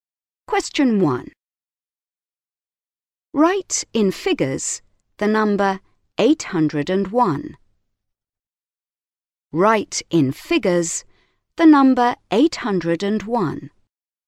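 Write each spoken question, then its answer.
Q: Write in figures the number 801.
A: 801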